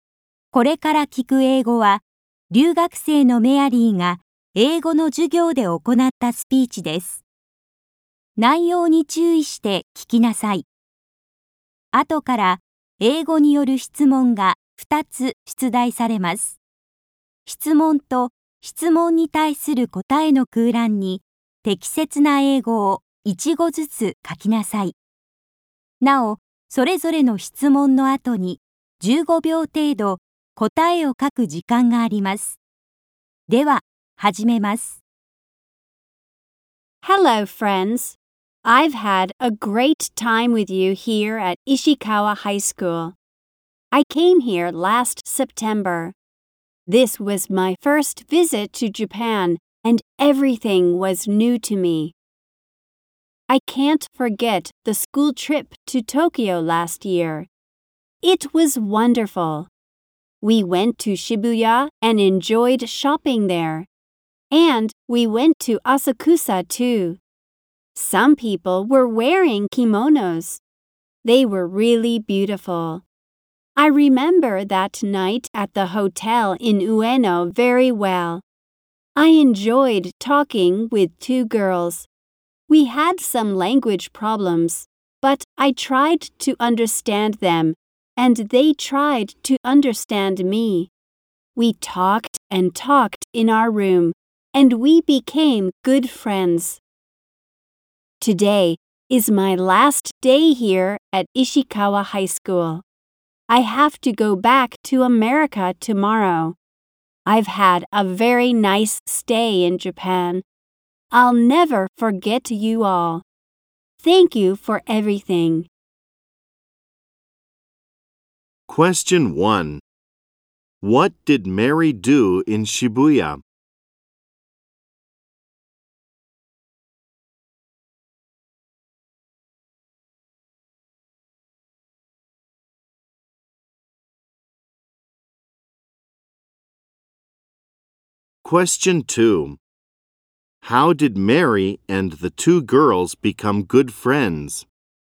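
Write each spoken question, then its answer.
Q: What did Mary do in Shibuya?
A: She enjoyed shopping there.

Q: How did Mary and the two girls become good friends?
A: They talked and talked in their room.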